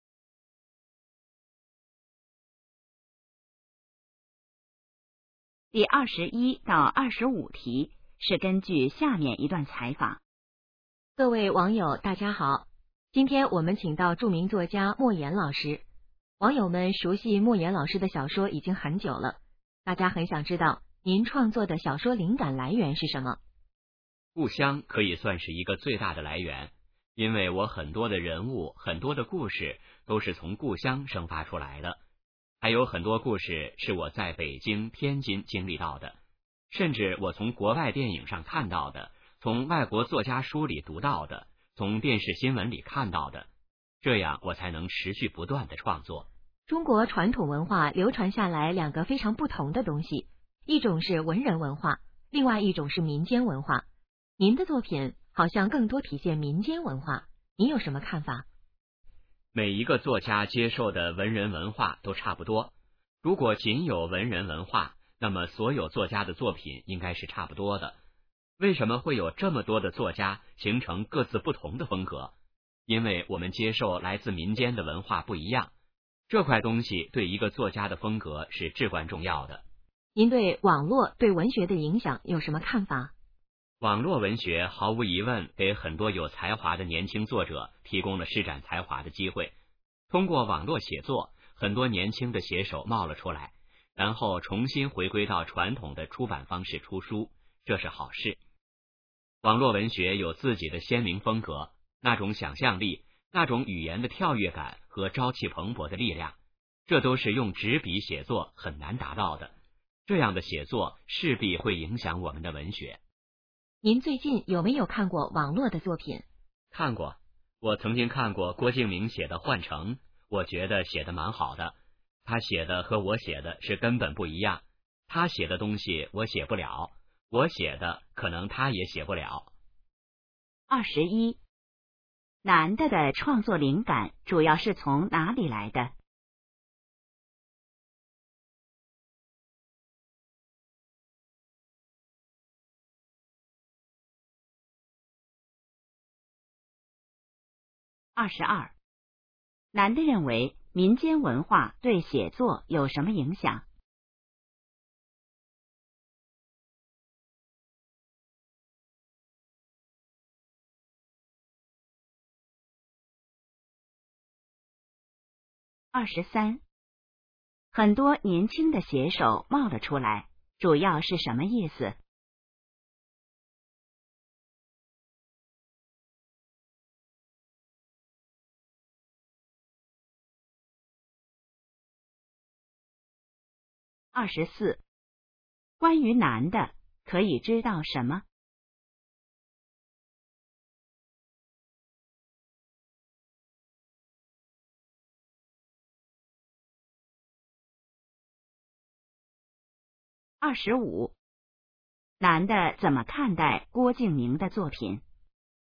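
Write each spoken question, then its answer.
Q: 男的的创作灵感主要是从哪里来的?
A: 故乡

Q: 男的认为民间文化对写作有什么影响?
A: 对作家的风格至关重要

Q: 很多年轻的写手冒了出来,主要是什么意思?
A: 很多年轻写手出现了

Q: 男的怎么看待郭敬明的作品?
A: 写得蛮好,和自己的风格完全不一样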